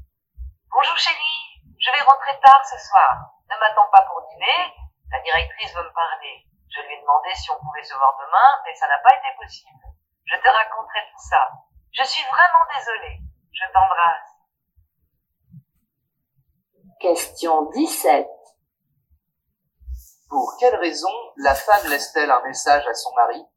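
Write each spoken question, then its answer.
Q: Pour quelle raison la femme laisse-t-elle un message à son mari ?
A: Elle rentrera très tard ce soir parce que la directrice veut lui parler ; il ne doit pas l'attendre pour dîner.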